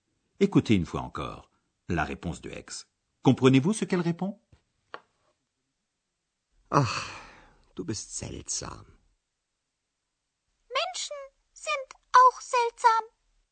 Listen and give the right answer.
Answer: x trouve que les êtres humains aussi, auch, sont bizarres.